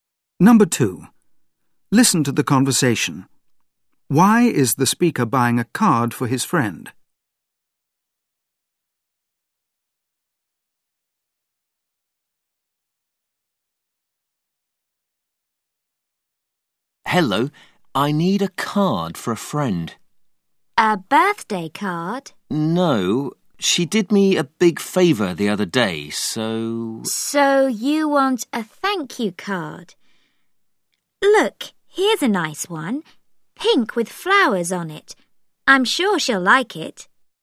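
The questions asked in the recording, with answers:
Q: Why is the speaker buying a card for his friend?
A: To thank her for a favour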